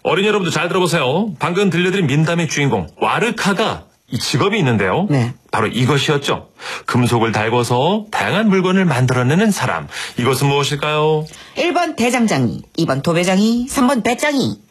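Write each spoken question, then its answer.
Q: 이것은 무엇일까요?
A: 1번: 대장장이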